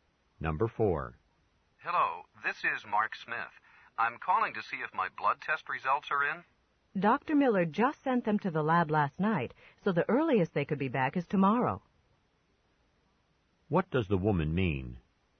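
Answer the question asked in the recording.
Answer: The results won't be in until tomorrow at the earliest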